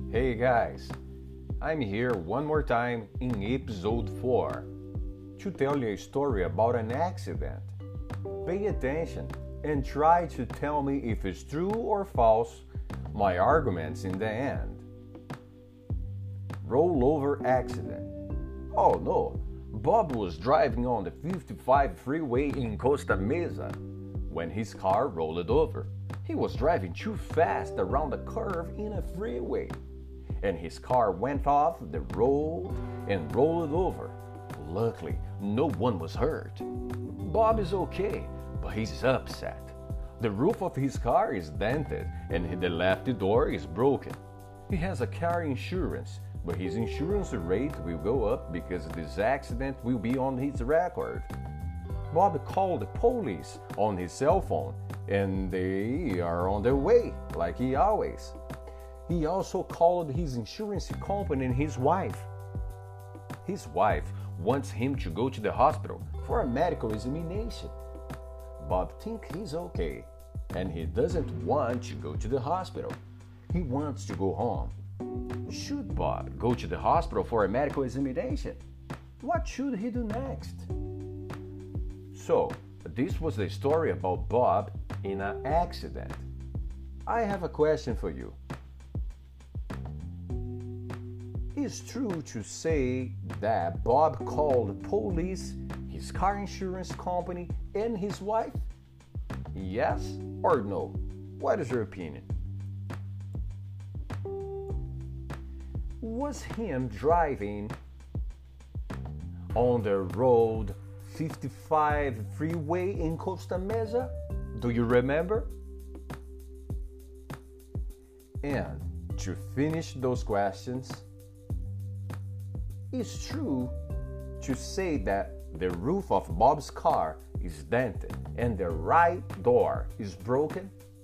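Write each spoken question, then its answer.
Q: Is true to say that Bob called police, his car insurance company, and his wife?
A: Yes (true)

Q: Was him driving on the road 55 freeway in Costa Mesa?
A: Yes

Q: it's true to say that the roof of Bob's car is dented and the right door is broken?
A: False: the left door is broken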